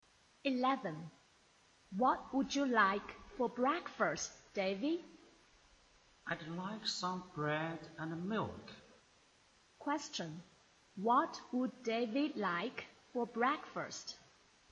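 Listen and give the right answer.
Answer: Bread and milk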